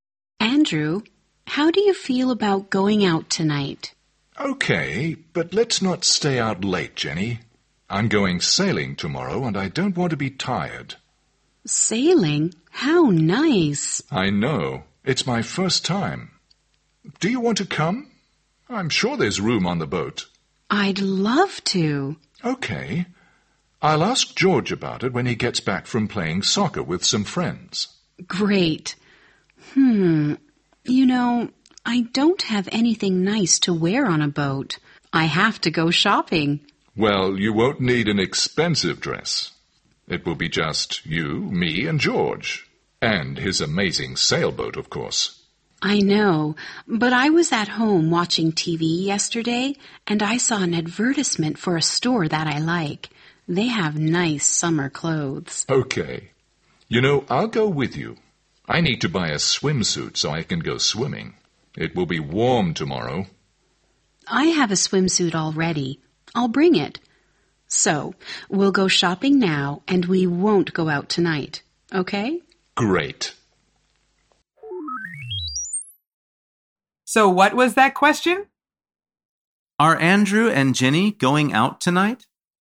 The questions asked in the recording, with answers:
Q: Are Andrew and Jenny going out tonight?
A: The answer is no. They're going shopping.